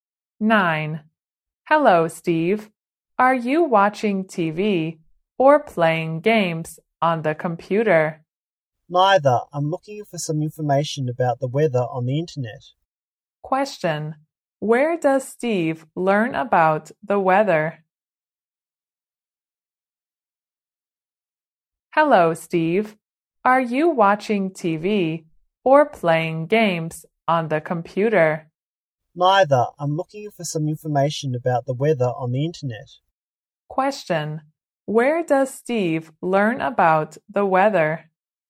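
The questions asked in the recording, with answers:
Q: Question. Where does Steve learn about the weather?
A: On the internet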